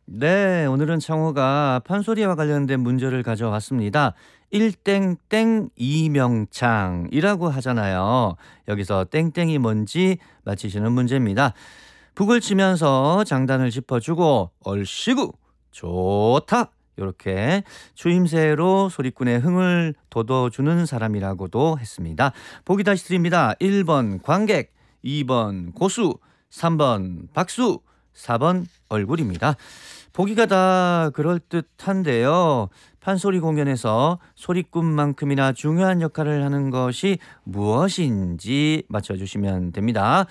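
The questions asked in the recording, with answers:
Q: 일땡땡 이명창이라고 하잖아요. 여기서 땡땡이 뭔지 맞히시는 문제입니다.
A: 2: 고수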